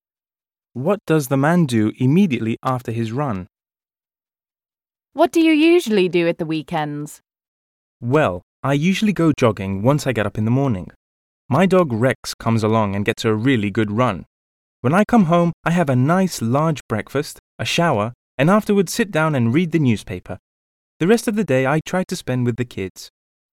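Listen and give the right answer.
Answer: Has a large breakfast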